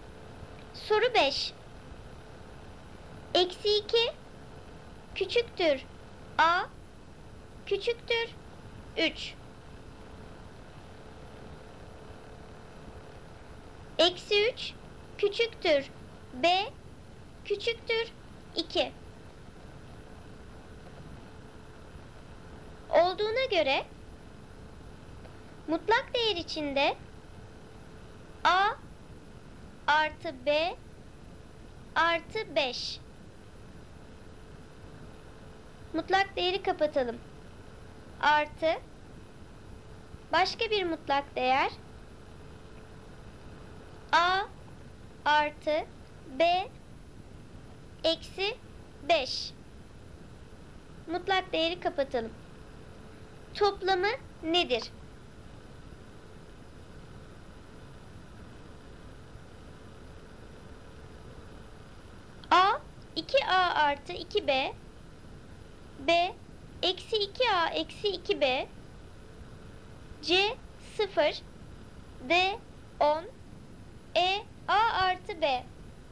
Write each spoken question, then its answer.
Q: Mutlak değeri kapatalım. Toplamı nedir?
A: Doğru cevap D 10.